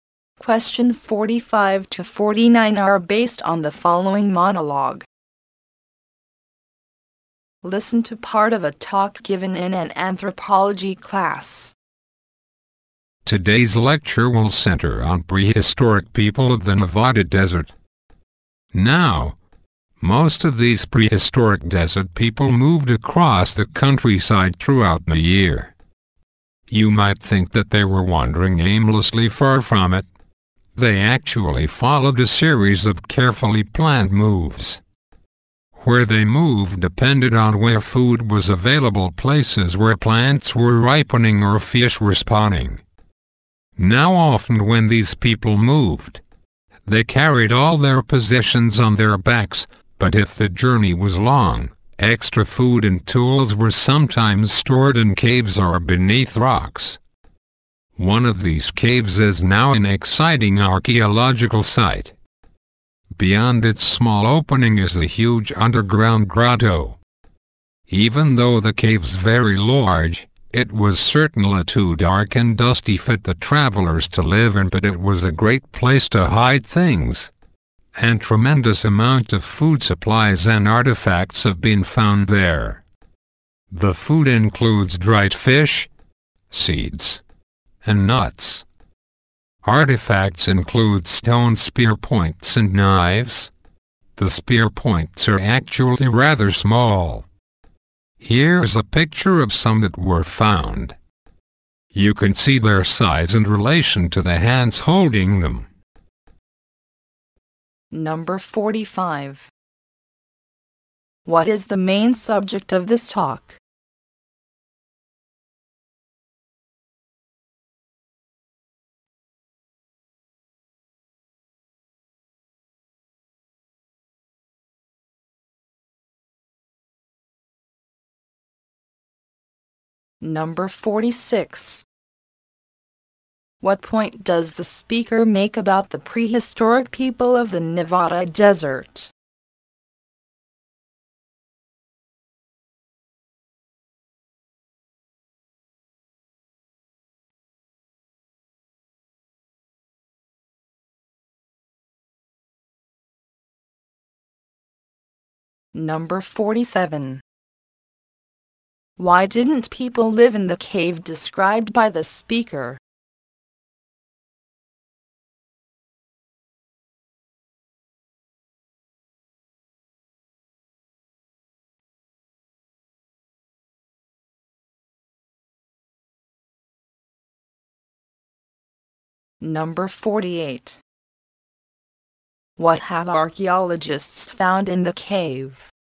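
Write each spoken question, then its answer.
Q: Why didn't people live in the cave described by the speaker?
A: It was too dark and dusty

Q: What have archaeologists found in the cave?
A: Food supplies and artifacts such as dried fish, seeds, nuts, spear points and knives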